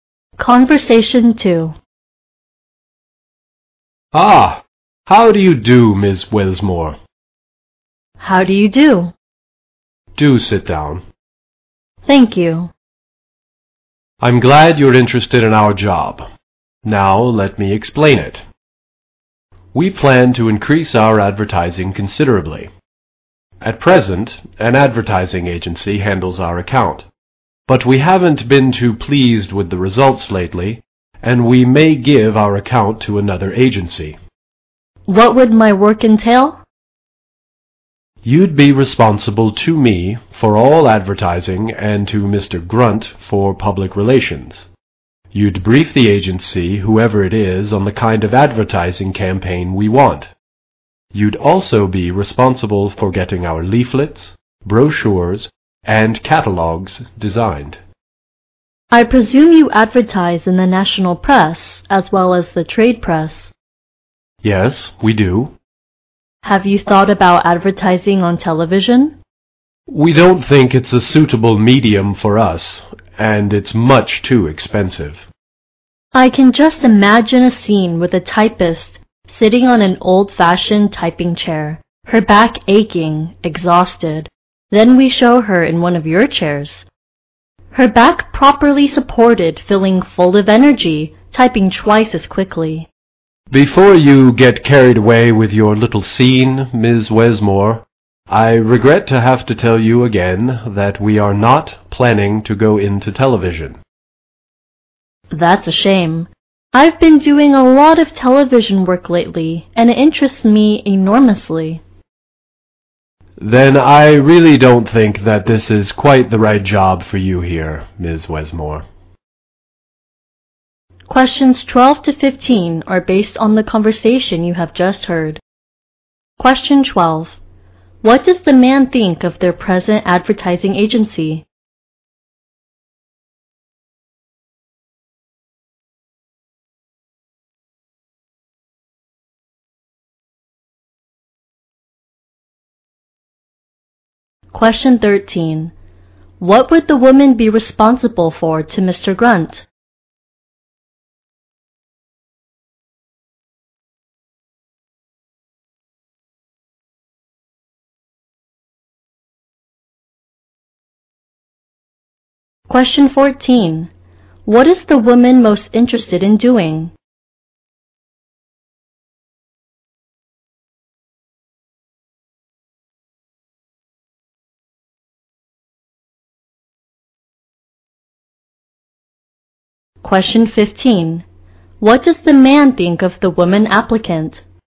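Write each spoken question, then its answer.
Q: What does the man think of their present advertising agency?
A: They are not pleased with its recent results.

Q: What would the woman be responsible for to Mr. Grunt?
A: Public relations.

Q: What is the woman most interested in doing?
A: Television advertising work.

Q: What does the man think of the woman applicant?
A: She is not right for the job.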